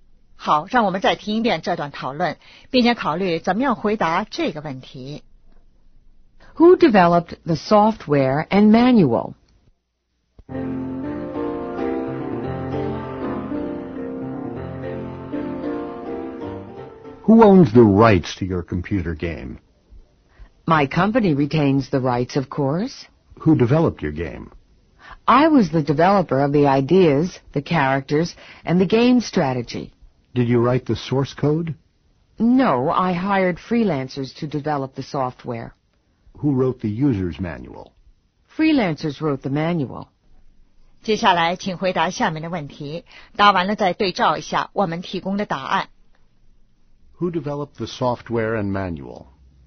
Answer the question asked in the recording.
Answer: Freelancers.